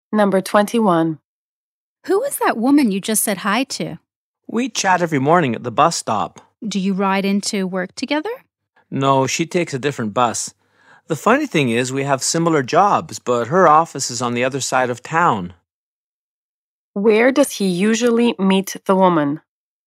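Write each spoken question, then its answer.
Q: Where does he usually meet the woman?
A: At the bus stop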